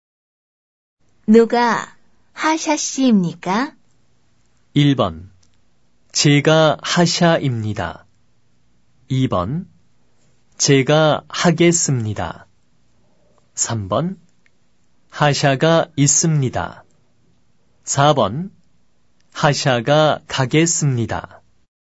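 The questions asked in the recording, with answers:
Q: 누가 하샤 씨입니까?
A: 1: 제가 하샤입니다.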